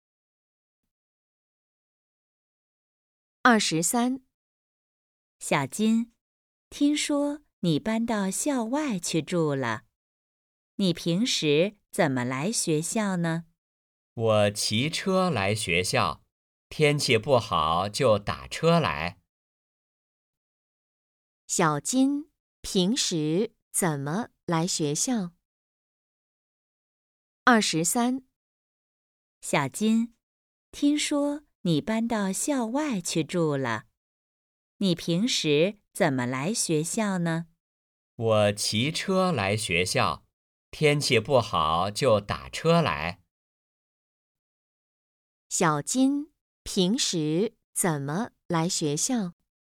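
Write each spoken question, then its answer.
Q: 小金平时怎么来学校?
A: 骑车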